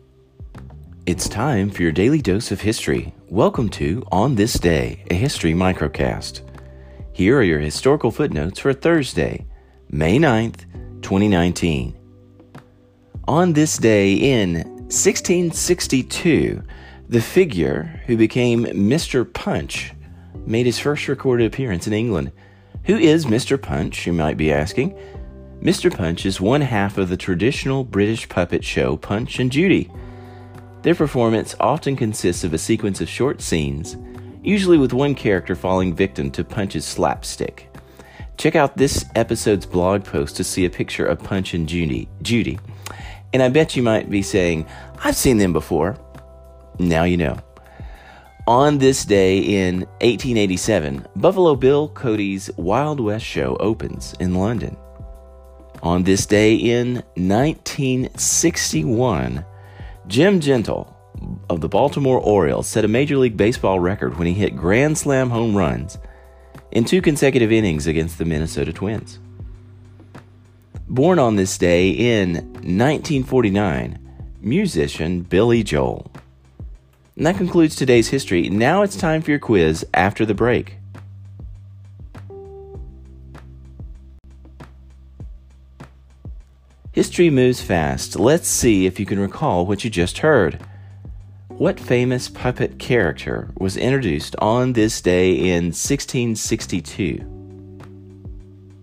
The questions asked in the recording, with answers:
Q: What famous puppet character was introduced on this day in 1662?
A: Answer Mr. Punch.